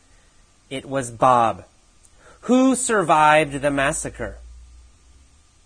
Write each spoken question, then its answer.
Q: Who survived the massacre?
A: Well, Bob survived the massacre.